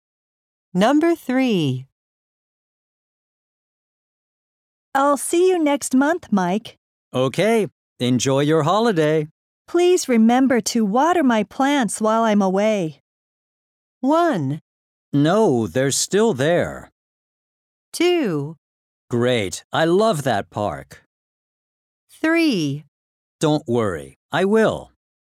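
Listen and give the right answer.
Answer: 3: Don't worry. I will.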